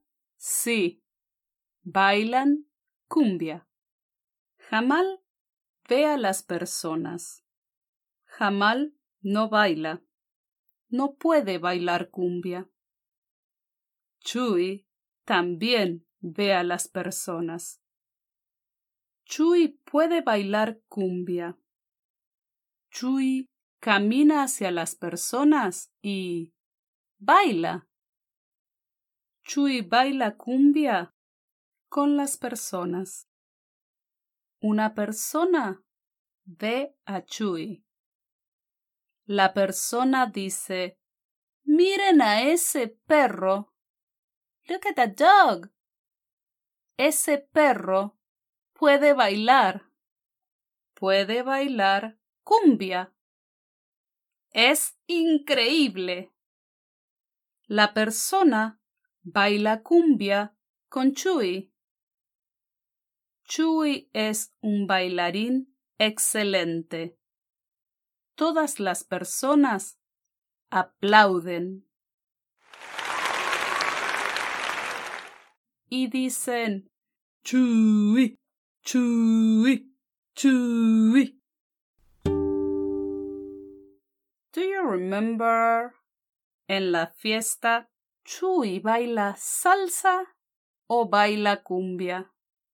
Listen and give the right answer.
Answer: Sí, en la fiesta, Chuy baila cumbia.